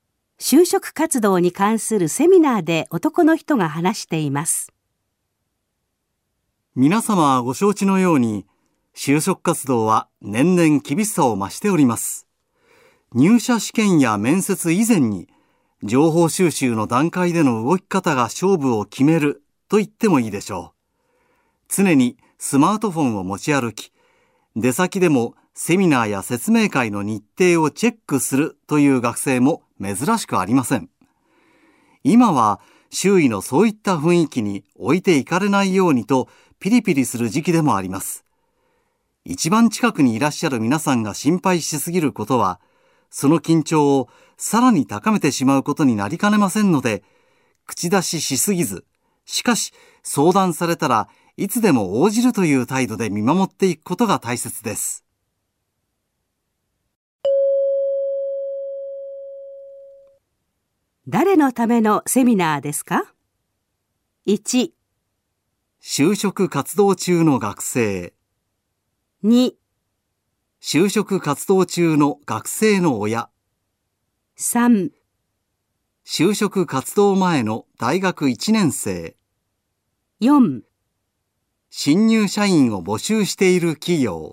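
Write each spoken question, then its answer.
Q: 誰のためのセミナーですか?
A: 2: 就職活動中の学生の親。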